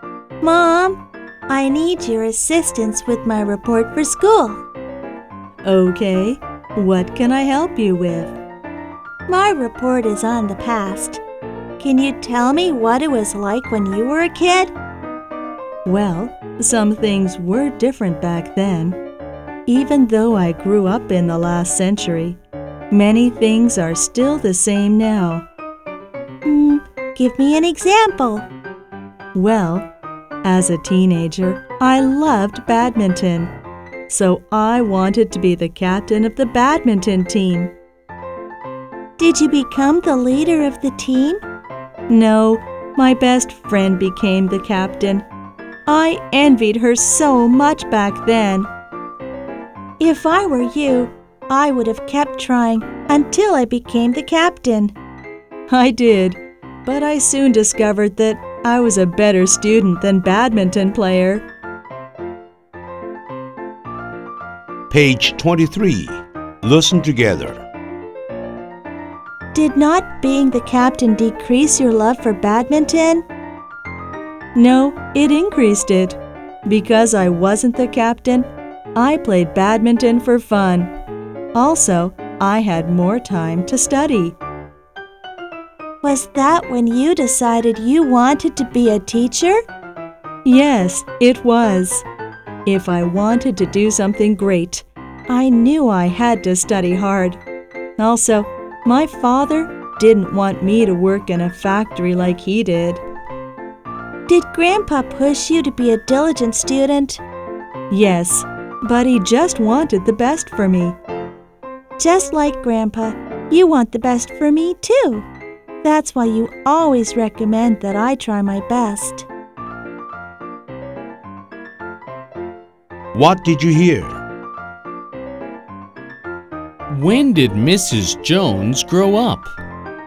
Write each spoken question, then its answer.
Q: When did Mrs. Jones grow up?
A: She grew up in the last century.